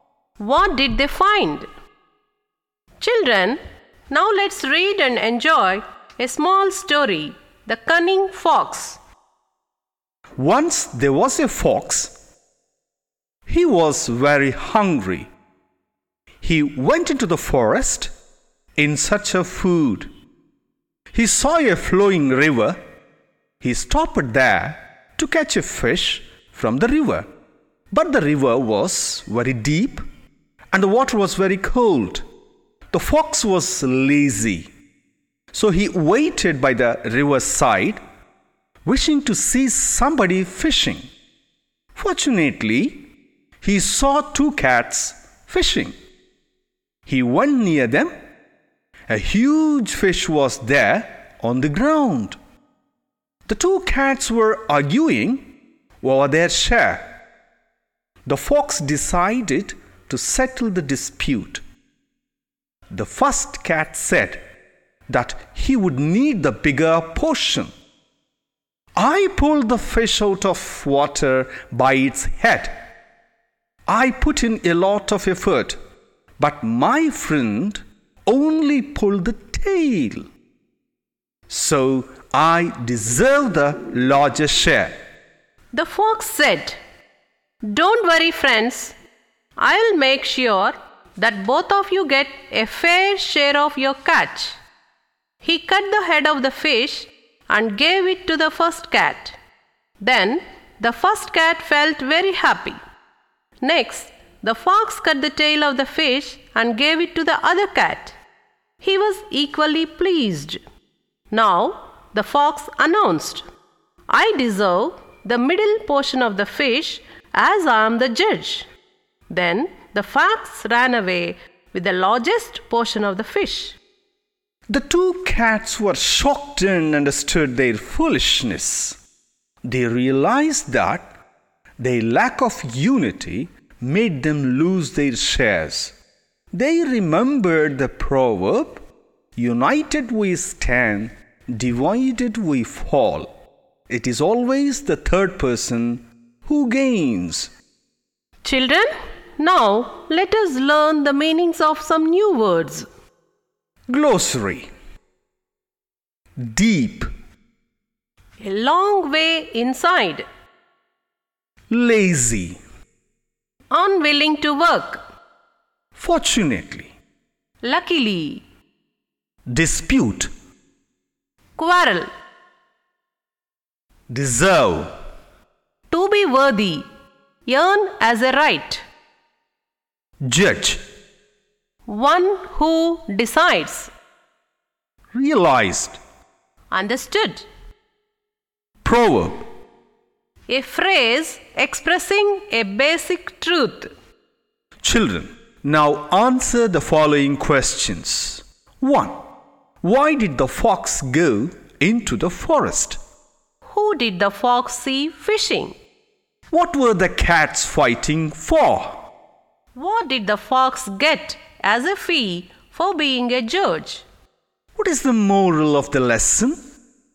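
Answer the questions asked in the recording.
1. He was very hungry and went in search of food.
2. Two cats
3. Their share of a huge fish
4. The middle (largest) portion of the fish
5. United we stand, divided we fall.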